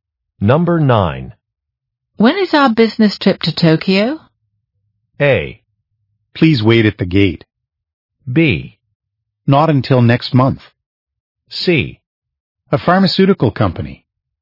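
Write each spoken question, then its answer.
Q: When is our business trip to Tokyo?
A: B: Not until next month.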